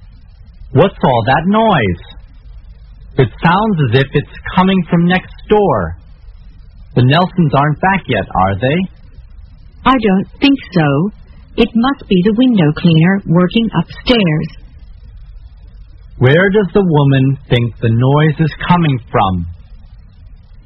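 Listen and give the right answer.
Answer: Upstairs, from the window cleaner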